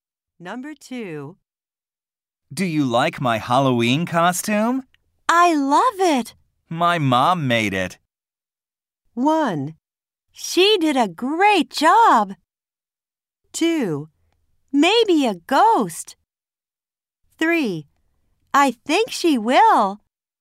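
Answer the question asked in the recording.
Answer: 1: She did a great job.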